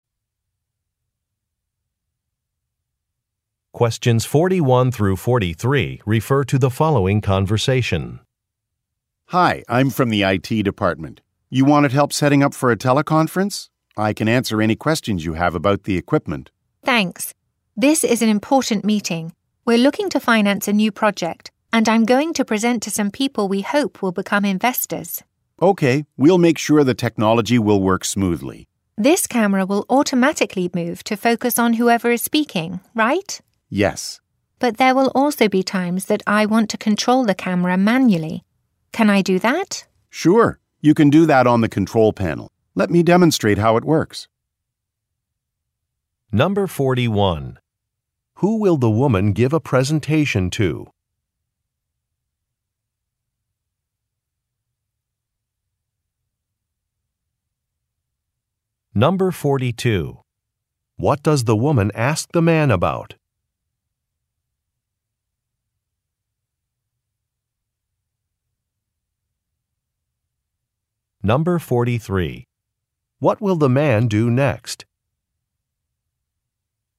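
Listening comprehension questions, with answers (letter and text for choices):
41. Who will the woman give a presentation to?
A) New employees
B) Government officials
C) Potential investors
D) Board members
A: C) Potential investors

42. What does the woman ask the man about?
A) Adjusting a microphone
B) Turning on a monitor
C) Connecting a speaker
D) Using a camera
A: D) Using a camera

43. What will the man do next?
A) Check a manual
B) Give a demonstration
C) Ask a colleague for help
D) Look for a tool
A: B) Give a demonstration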